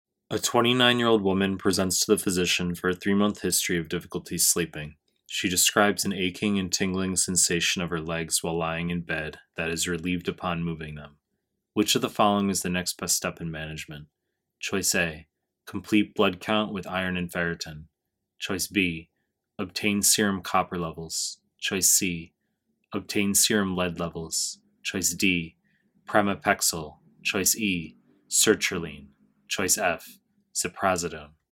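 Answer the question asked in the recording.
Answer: A: complete blood count with iron and ferritin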